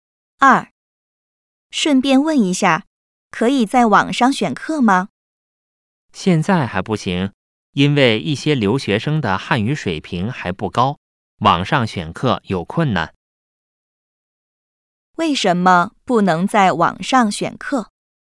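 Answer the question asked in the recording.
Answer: 一些留学生的汉语水平还不高,网上选课有困难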